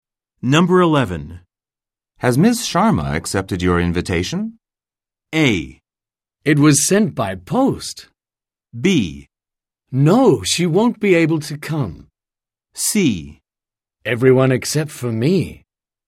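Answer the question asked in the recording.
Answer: B: No, she won't be able to come.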